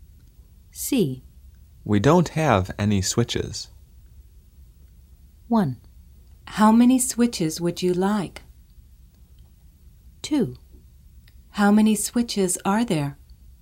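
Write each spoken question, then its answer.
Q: We don't have any switches.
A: 2: How many switches are there?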